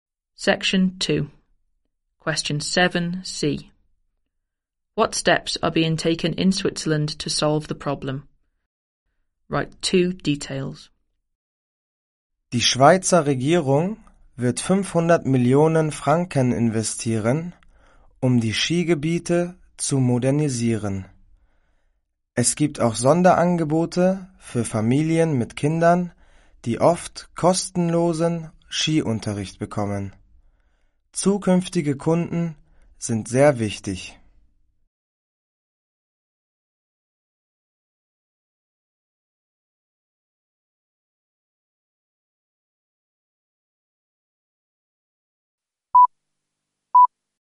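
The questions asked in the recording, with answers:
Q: What steps are being taken in Switzerland to solve the problem?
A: Government investing 500 million francs to modernise ski areas; special offers for families with free ski lessons for children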